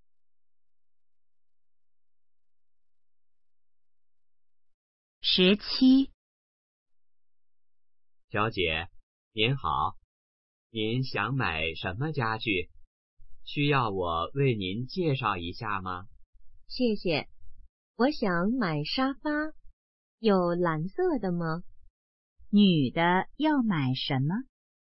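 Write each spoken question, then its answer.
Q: 女的要买什么?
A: 沙发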